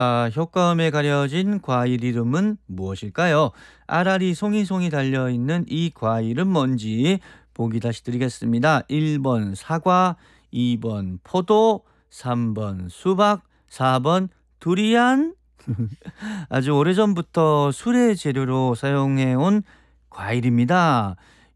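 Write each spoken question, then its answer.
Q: 아라리 송이송이 달려있는 이 과일은 뭔지 보기 다시 드리겠습니다.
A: 2: 포도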